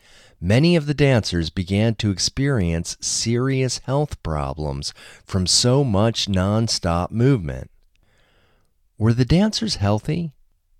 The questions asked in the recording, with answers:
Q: Were the dancers healthy?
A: No, many of them began to experience serious health problems.